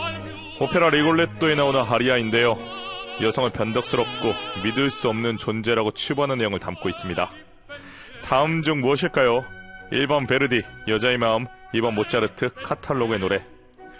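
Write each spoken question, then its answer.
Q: 다음 중 무엇일까요? 1번 베르디, 여자의 마음, 2번 모차르트, 카탈로그의 노래.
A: 1: 베르디, 여자의 마음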